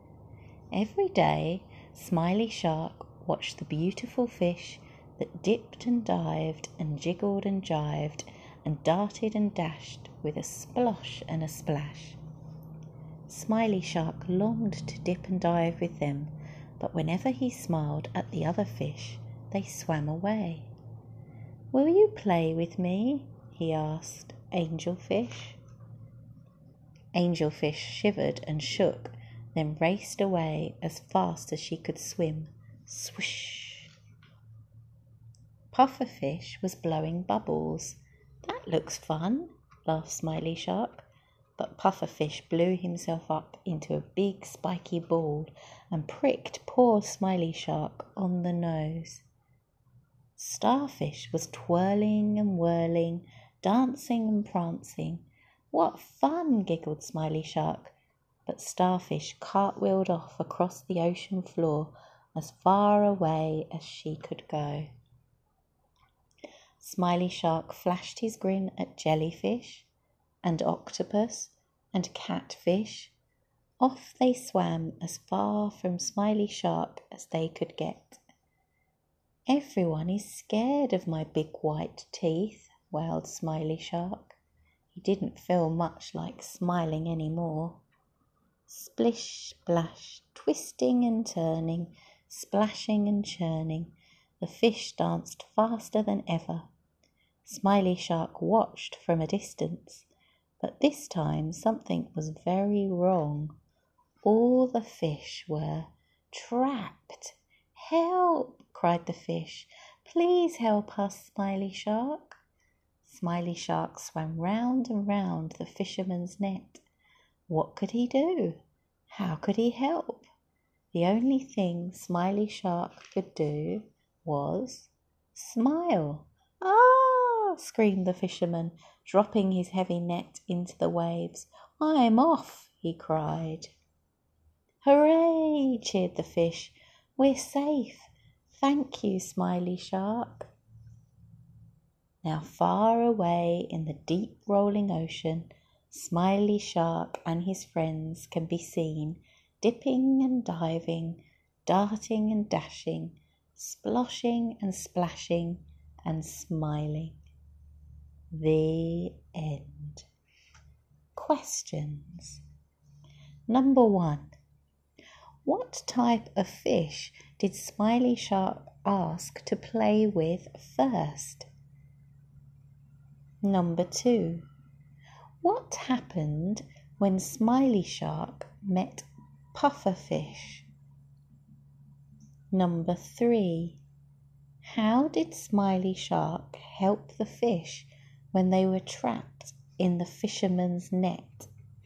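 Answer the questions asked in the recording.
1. Angelfish
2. Pufferfish blew himself up into a big spiky ball and pricked Smiley Shark on the nose
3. He smiled and scared the fisherman away, so the fisherman dropped the net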